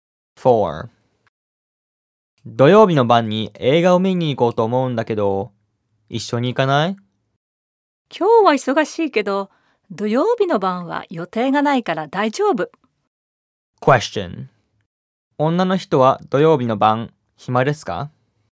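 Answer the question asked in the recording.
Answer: 暇なはずです。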